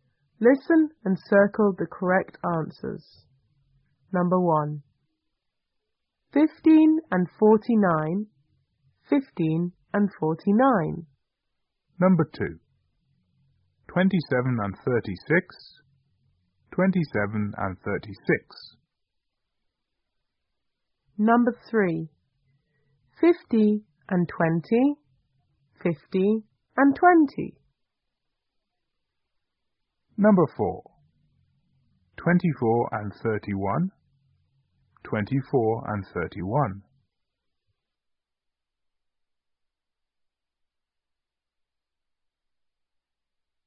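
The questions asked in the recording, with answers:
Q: 15 and 49. 15 and 49.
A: 64

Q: 27 and 36. 27 and 36.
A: 63

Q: 50 and 20, 50 and 20.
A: 70

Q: 24 and 31, 24 and 31.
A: 55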